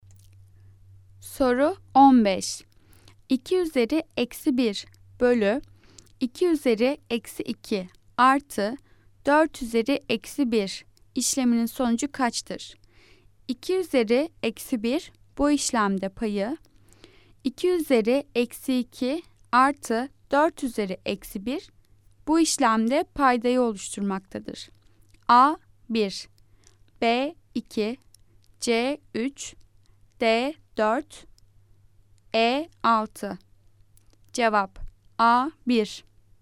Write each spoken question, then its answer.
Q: 2 üzeri eksi 1 bölü 2 üzeri eksi 2 artı 4 üzeri eksi 1 işleminin sonucu kaçtır?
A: Cevap A 1.